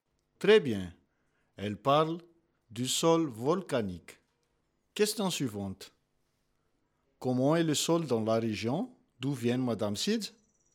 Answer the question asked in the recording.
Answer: Très bien. Le sol dans la région d'où vient Madame Sidz est très fertile.